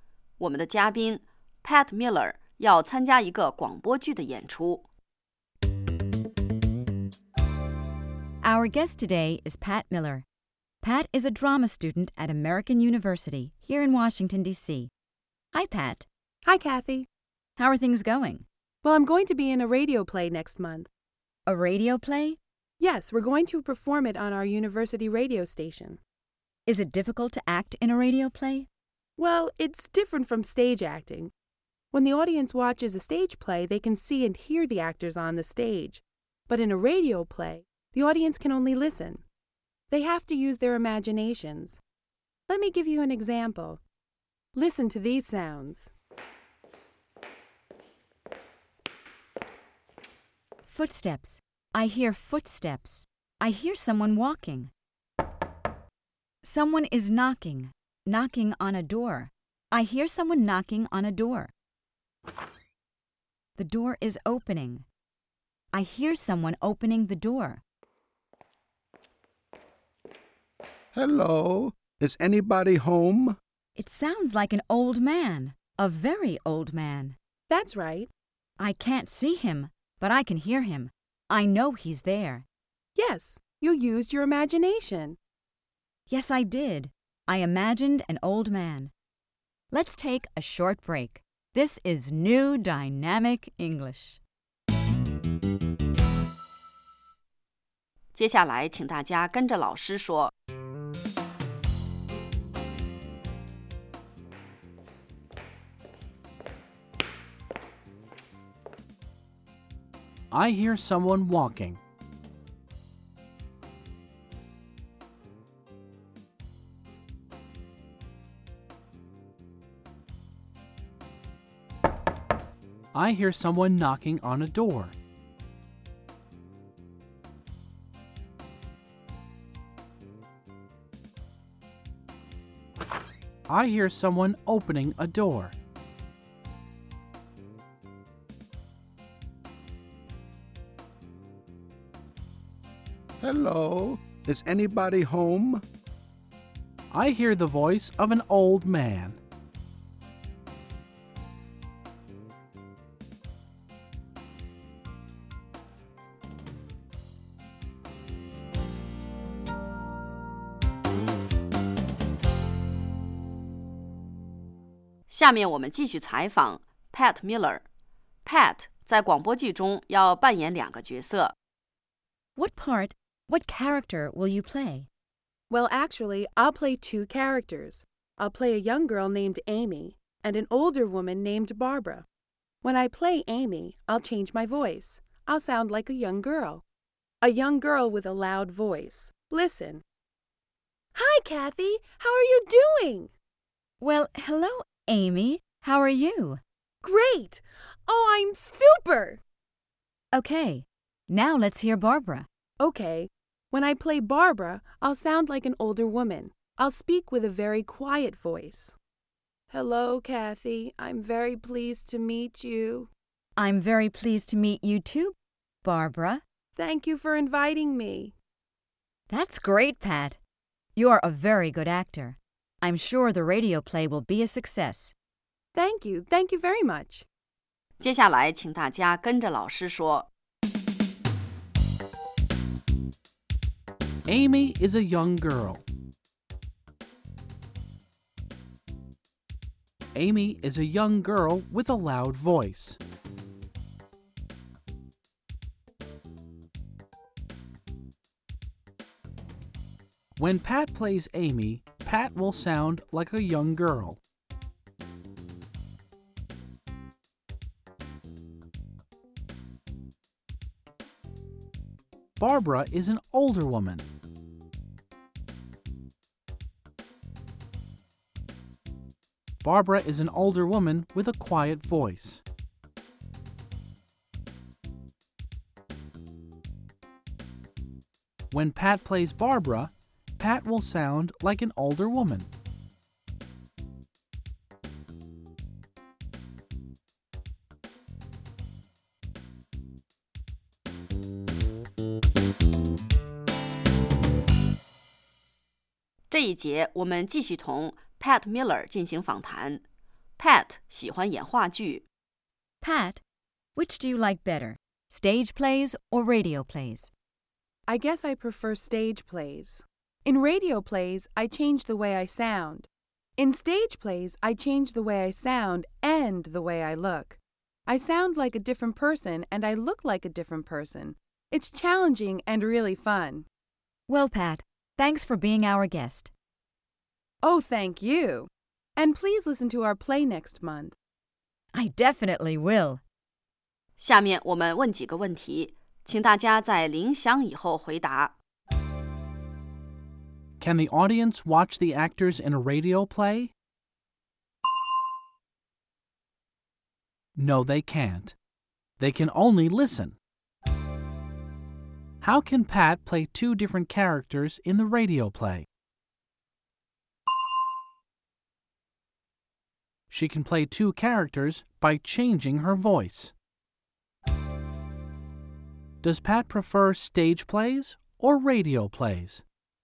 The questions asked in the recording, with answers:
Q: Can the audience watch the actors in a radio play?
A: No, they can't. They can only listen.

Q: Does Pat prefer stage plays or radio plays?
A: She prefers stage plays.